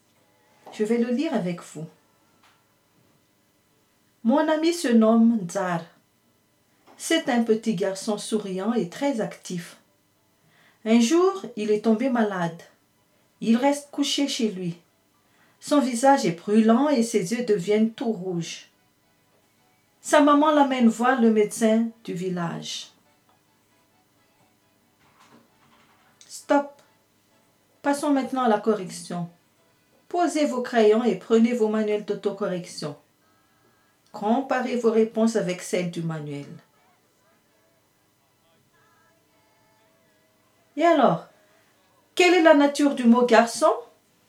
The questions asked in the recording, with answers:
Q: Et alors, quelle est la nature du mot garçon?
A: Oui, c'est un nom. Le mot garçon est un nom.